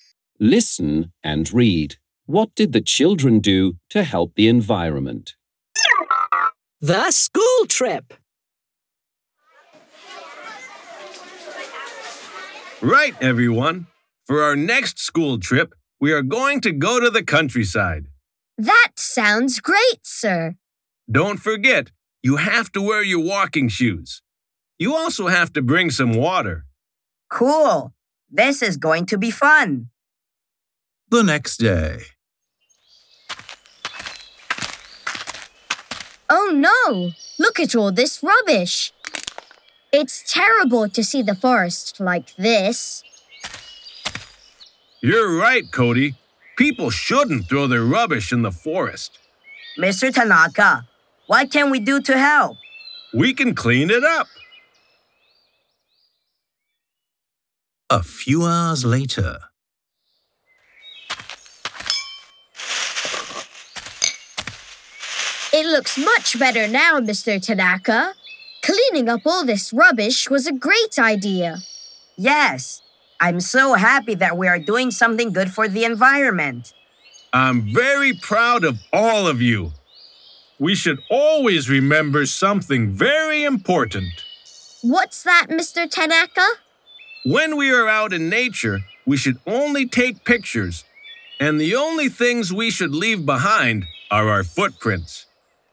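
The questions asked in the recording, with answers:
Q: What did the children do to help the environment?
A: They cleaned up the rubbish in the forest.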